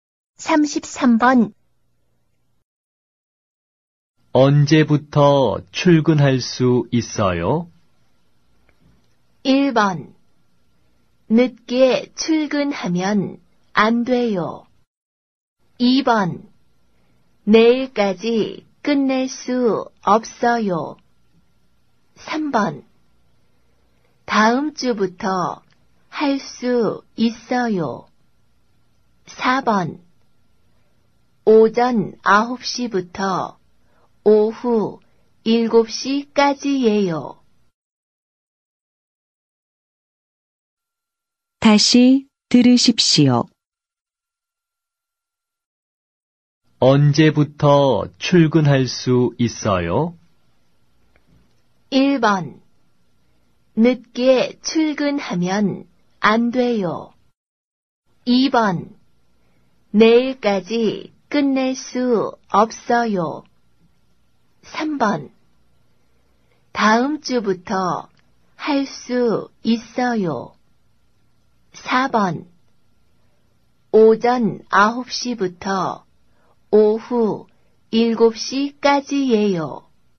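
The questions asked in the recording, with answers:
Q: 언제부터 출근할 수 있어요?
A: 3: 다음 주부터 할 수 있어요.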